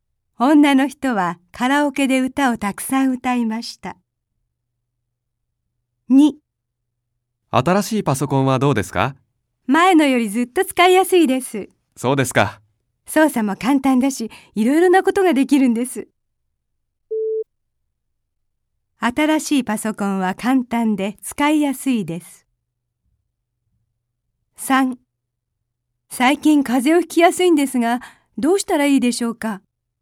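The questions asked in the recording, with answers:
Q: 新しいパソコンは簡単で使いやすいです。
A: ○(正しい)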